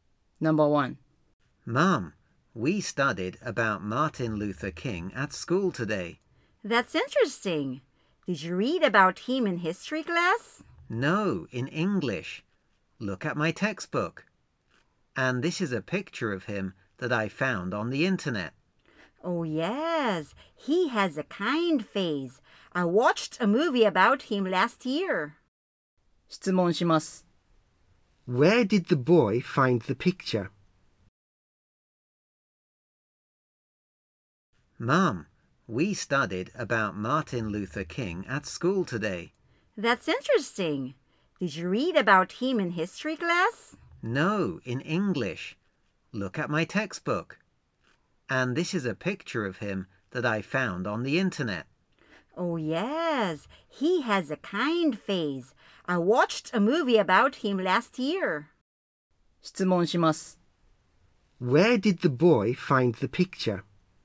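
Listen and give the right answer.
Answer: On the internet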